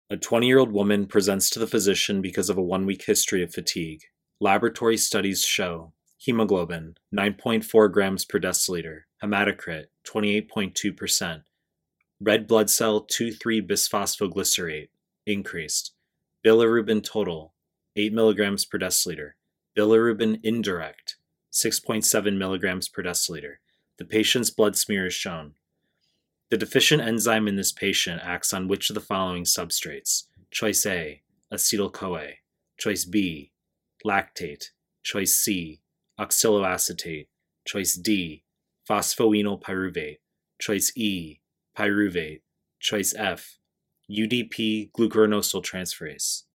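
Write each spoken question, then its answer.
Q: The deficient enzyme in this patient acts on which of the following substrates?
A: D: phosphoenolpyruvate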